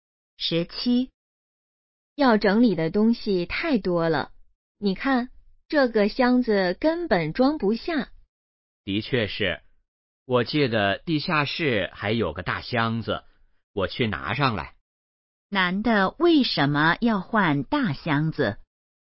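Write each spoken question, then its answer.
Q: 男的为什么要换大箱子?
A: 东西太多,箱子装不下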